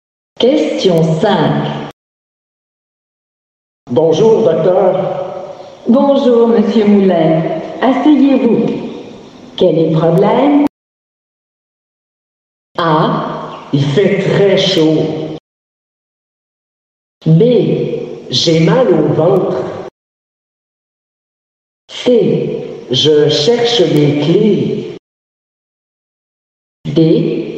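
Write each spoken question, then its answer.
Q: Asseyez-vous. Quel est le problème?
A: B: J'ai mal au ventre.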